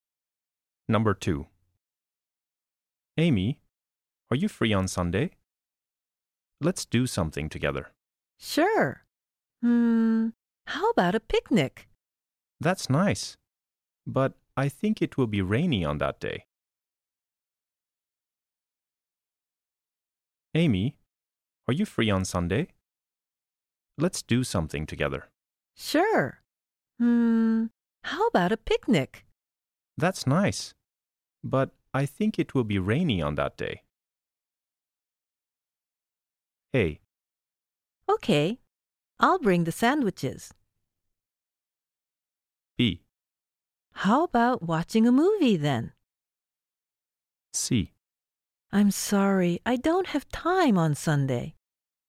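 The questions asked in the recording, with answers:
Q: That's nice. But I think it will be rainy on that day.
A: B: How about watching a movie then?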